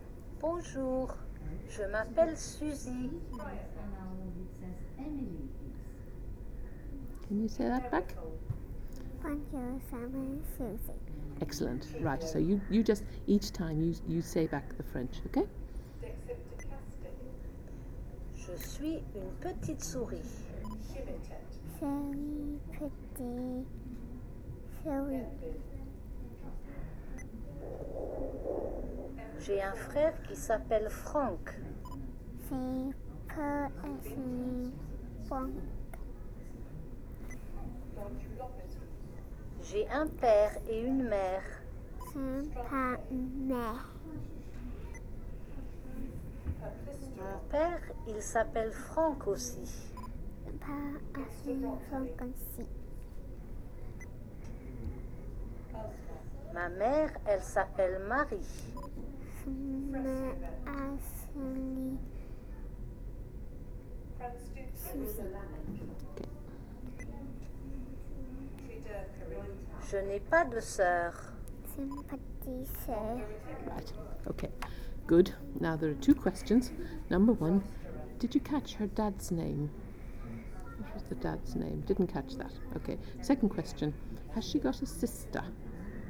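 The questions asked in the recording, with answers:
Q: did you catch her dad's name?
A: Franck

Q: has she got a sister?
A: No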